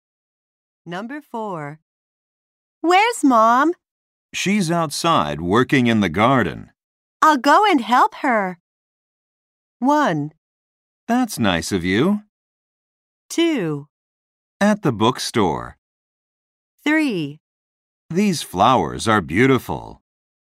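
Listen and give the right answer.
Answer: 1: That's nice of you.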